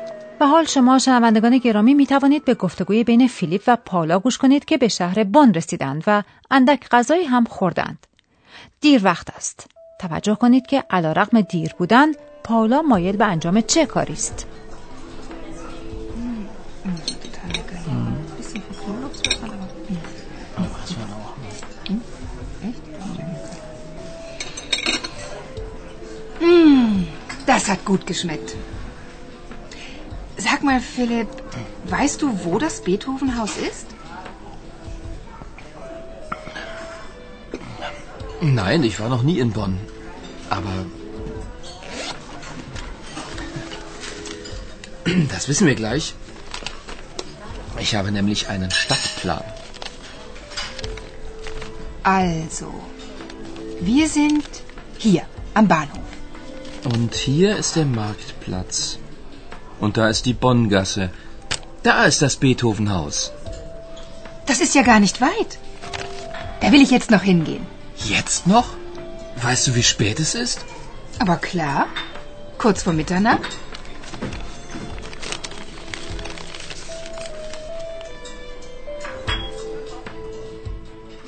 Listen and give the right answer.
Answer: پاولا مایل است که به